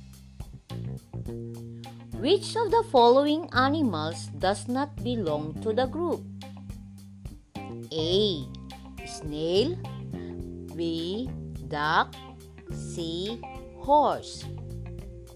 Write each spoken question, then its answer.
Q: Which of the following animals does not belong to the group?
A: If you answered letter A, that is correct.